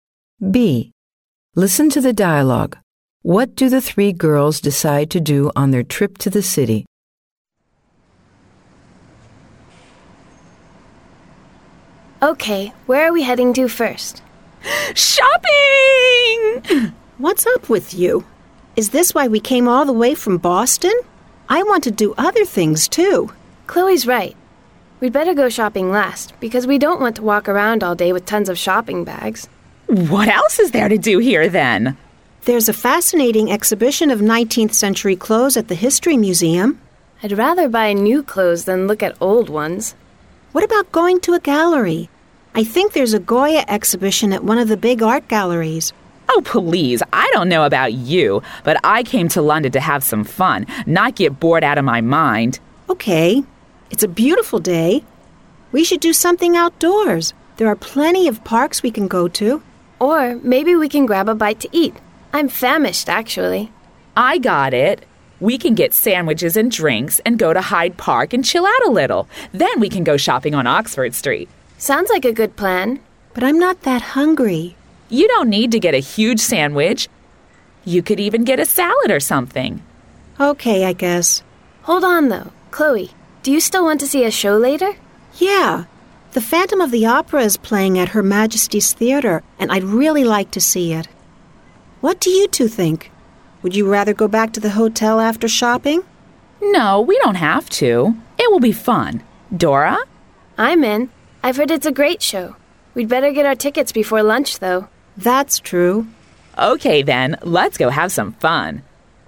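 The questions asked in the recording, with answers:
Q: What do the three girls decide to do on their trip to the city?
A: Buy tickets for The Phantom of the Opera, have a picnic lunch in Hyde Park, go shopping on Oxford Street, then see the show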